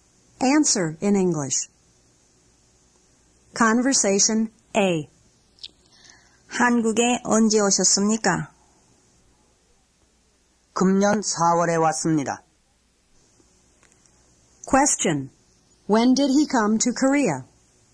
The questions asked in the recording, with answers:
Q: When did he come to Korea?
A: He came in April of this year.